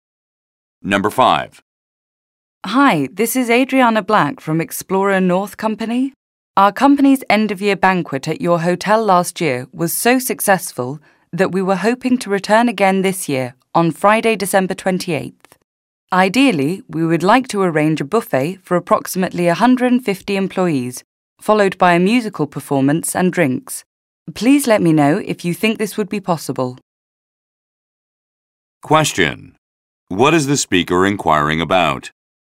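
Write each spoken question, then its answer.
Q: What is the speaker inquiring about?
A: Booking the hotel for the company's year-end banquet on December 28th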